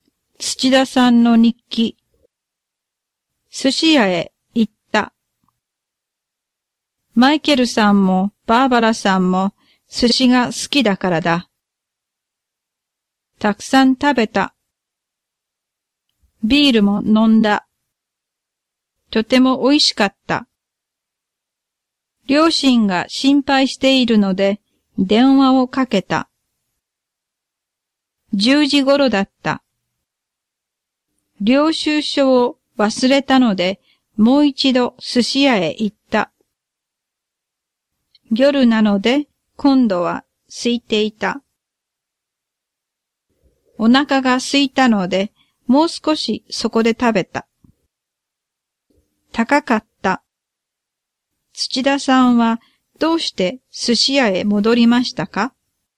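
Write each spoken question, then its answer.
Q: 土田さんはどうして寿司屋へ戻りましたか?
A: 領収書を忘れたからです。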